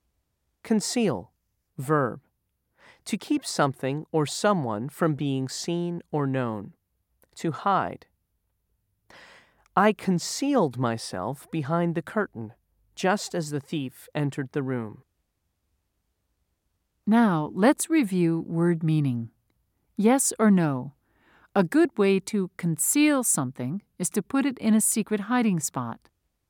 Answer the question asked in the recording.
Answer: If you said yes, you are correct.